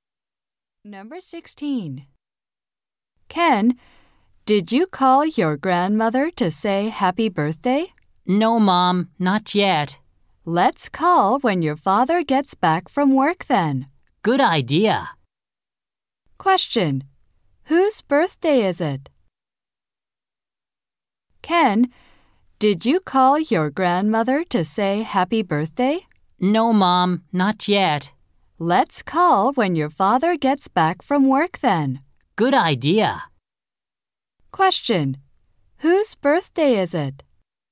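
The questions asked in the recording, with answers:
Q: Whose birthday is it?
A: Ken's grandmother's.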